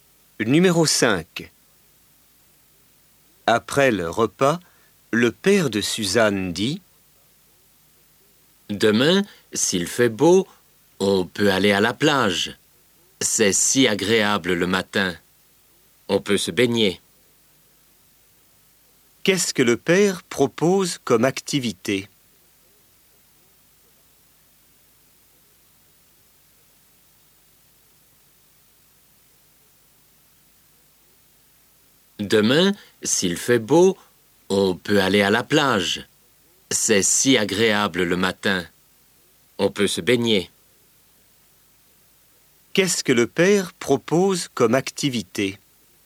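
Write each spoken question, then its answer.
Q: Qu'est-ce que le père propose comme activité?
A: Aller à la plage se baigner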